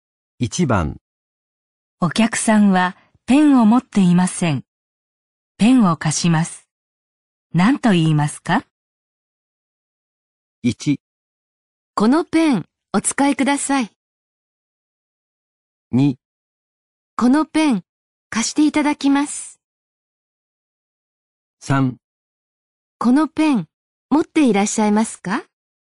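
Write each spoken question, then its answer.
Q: お客さんはペンを持っていません。ペンを貸します。何と言いますか?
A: 1: このペンお使いください。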